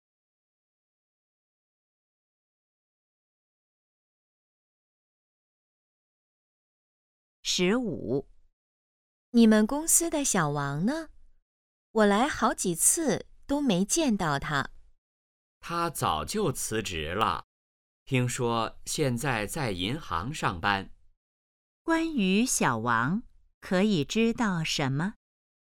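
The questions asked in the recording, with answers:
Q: 关于小王,可以知道什么?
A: 他辞职了,现在在银行上班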